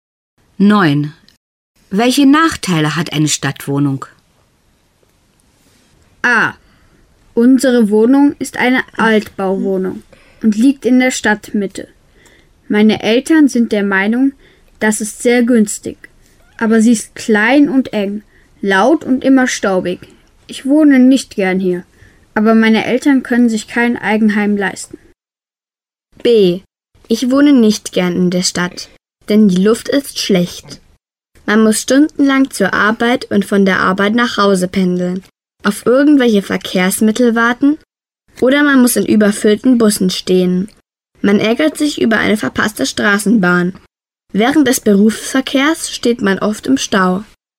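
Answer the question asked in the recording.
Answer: Sie ist klein, eng, laut und staubig; die Luft ist schlecht, man pendelt lange, steht in überfüllten Bussen und im Stau.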